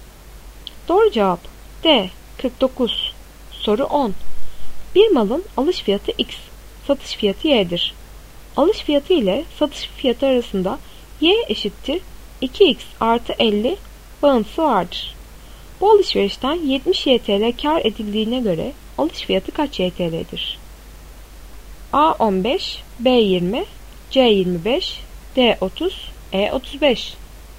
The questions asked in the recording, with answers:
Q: Bu alışverişten 70 YTL kar edildiğine göre alış fiyatı kaç YTL'dir?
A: Doğru cevap B 20.